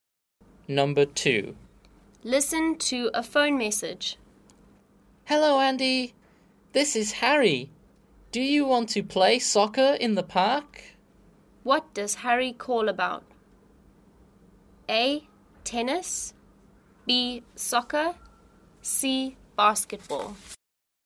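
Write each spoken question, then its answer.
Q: What does Harry call about?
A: B: Soccer.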